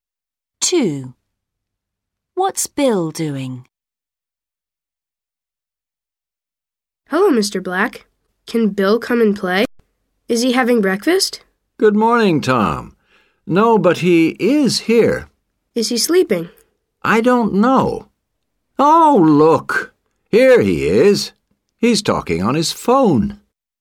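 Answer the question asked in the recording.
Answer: Talking on his phone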